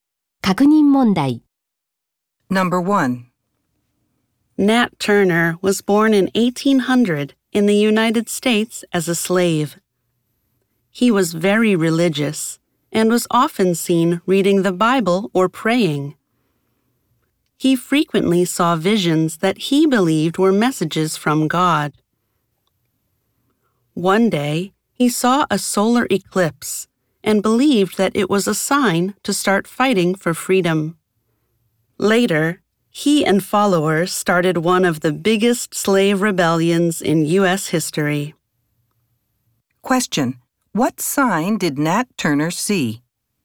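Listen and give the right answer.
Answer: A solar eclipse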